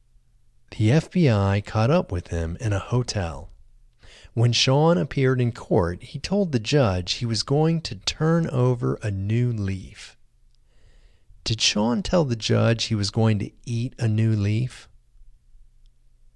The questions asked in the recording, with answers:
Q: Did Sean tell the judge he was going to eat a new leaf?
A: No, Sean didn't tell the judge he was going to eat a new leaf.